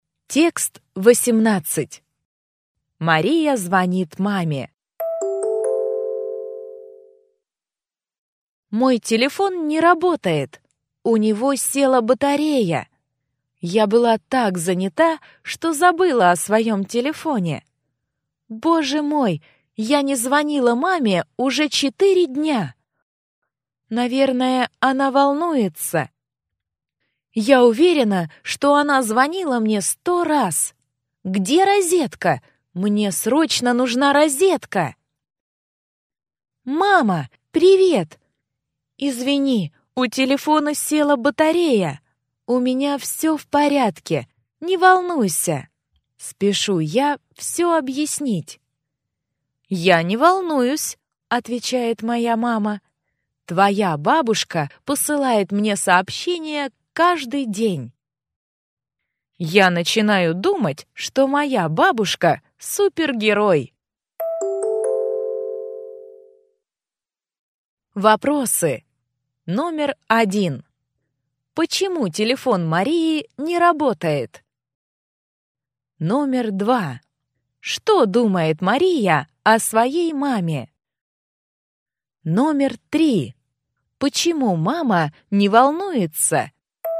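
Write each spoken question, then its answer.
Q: Почему телефон Марии не работает?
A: У него села батарея.

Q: Что думает Мария о своей маме?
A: Что мама волнуется и звонила ей 100 раз.

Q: Почему мама не волнуется?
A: Бабушка посылает ей сообщение каждый день.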